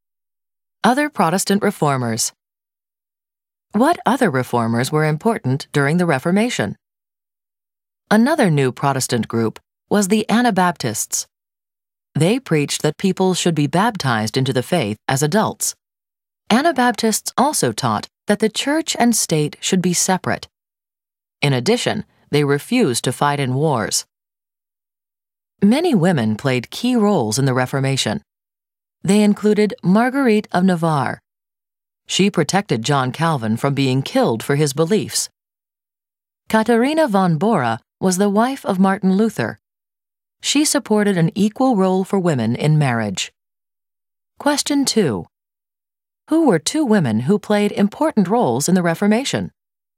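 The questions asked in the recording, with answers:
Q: Who were two women who played important roles in the Reformation?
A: Marguerite of Navarre and Katharina von Bora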